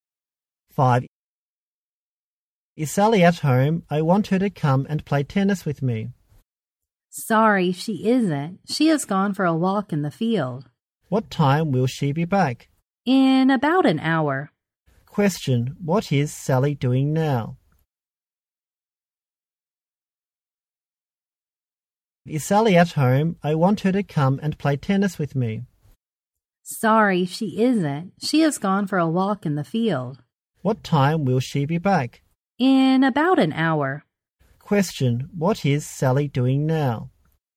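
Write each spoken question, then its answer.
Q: what is Sally doing now?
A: Taking a walk in the field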